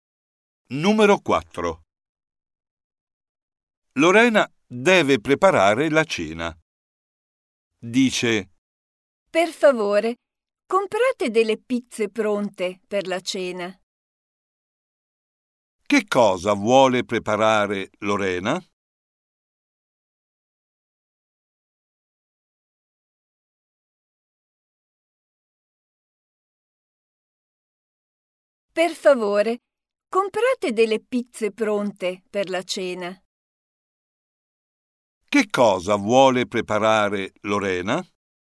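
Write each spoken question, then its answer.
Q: Che cosa vuole preparare Lorena?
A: pizze pronte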